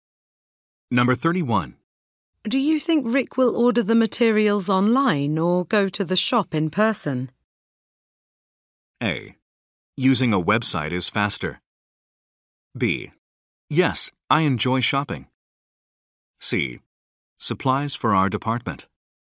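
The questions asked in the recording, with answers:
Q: Do you think Rick will order the materials online or go to the shop in person?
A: A: Using a website is faster.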